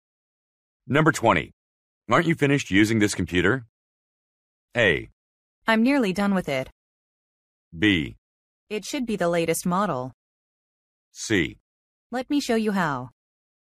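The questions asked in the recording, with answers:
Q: Aren't you finished using this computer?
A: A: I'm nearly done with it.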